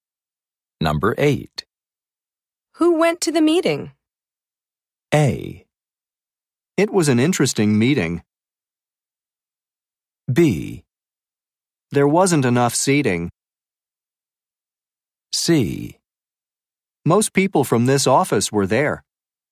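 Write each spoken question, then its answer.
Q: Who went to the meeting?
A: C: Most people from this office were there.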